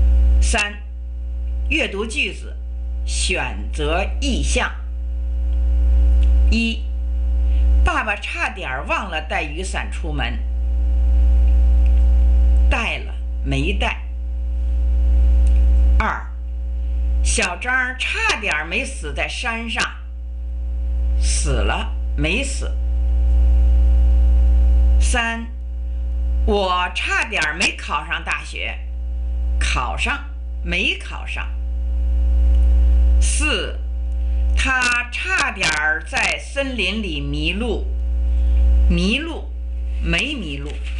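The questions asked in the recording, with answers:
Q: 爸爸差点忘了带雨伞出门。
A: 带了

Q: 小张差点没死在山上。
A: 没死

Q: 我差点没考上大学。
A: 考上

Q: 他差点在森林里迷路。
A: 没迷路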